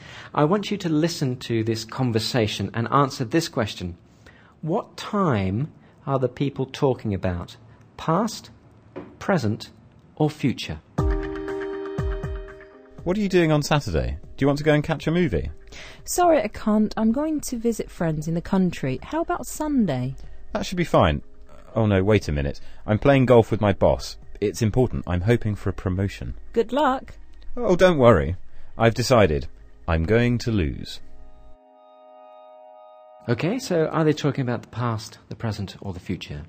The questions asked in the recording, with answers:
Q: What time are the people talking about?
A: Future.